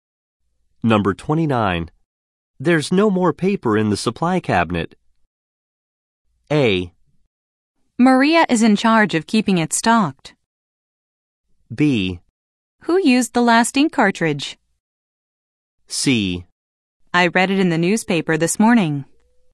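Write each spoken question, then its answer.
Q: There's no more paper in the supply cabinet.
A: A: Maria is in charge of keeping it stocked.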